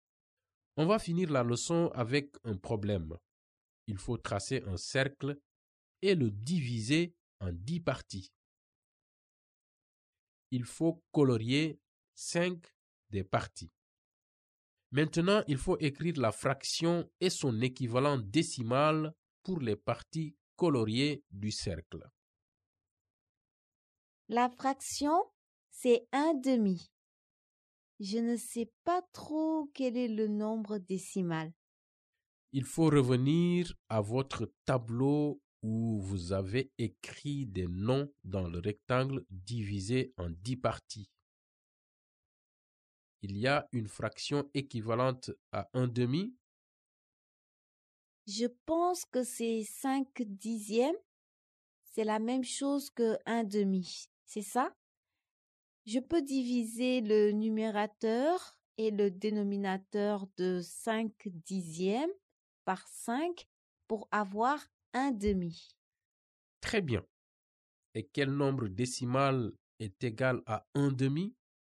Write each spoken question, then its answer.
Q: Et quel nombre décimal est égal à 1/2?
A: 0,5.